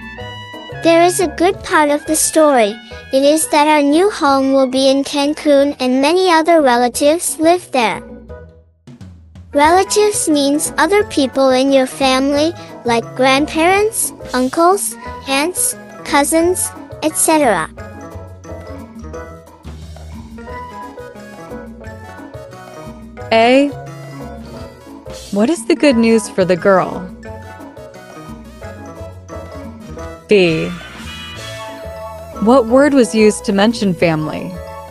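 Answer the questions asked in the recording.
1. Their new home will be in Cancun, where many relatives live
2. Relatives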